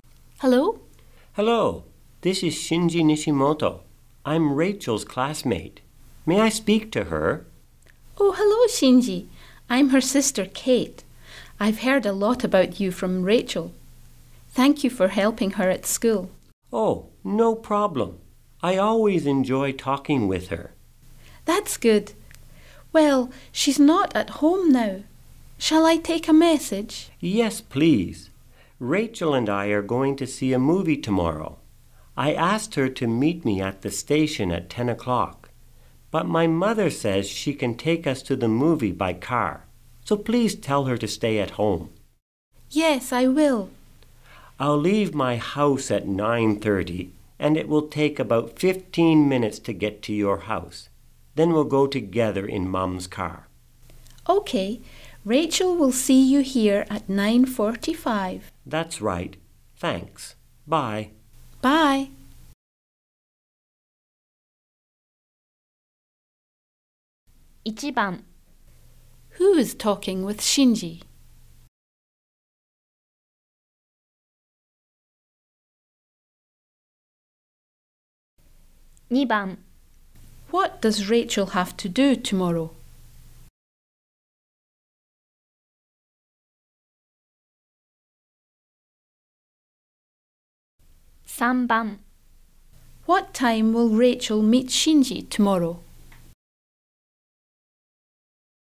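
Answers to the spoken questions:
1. Kate, Rachel's sister
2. Stay at home and wait for Shinji
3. At 9:45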